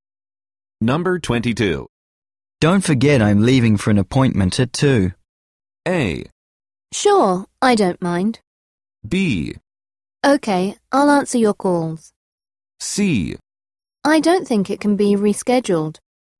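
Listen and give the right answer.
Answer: B: Okay, I'll answer your calls.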